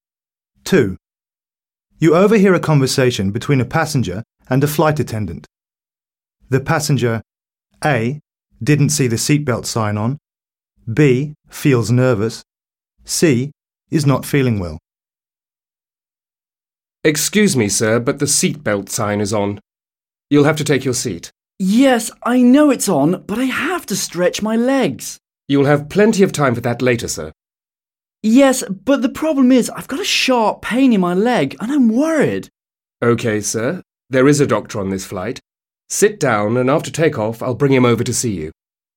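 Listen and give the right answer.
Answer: C: is not feeling well.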